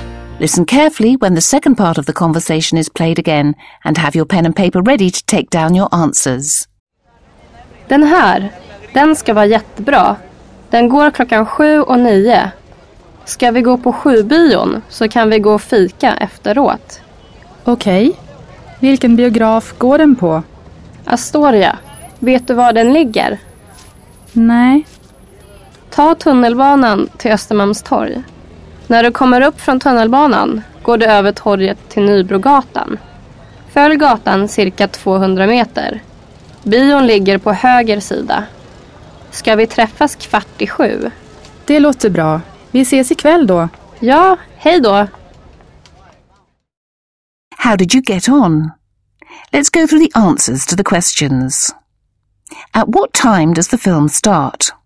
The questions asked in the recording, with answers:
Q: At what time does the film start?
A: The film that Maria thinks that they should see is screened at 7 and at 9 o'clock.